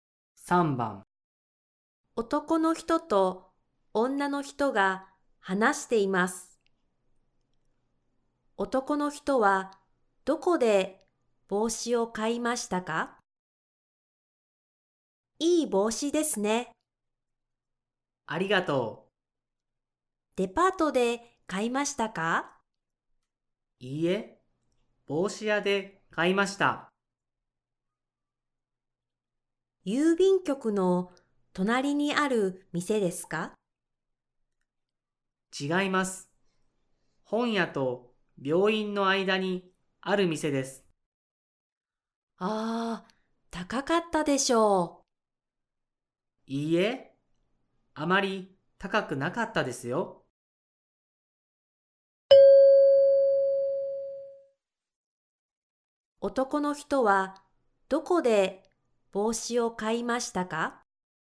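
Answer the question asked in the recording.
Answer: 本屋と病院の間にある帽子屋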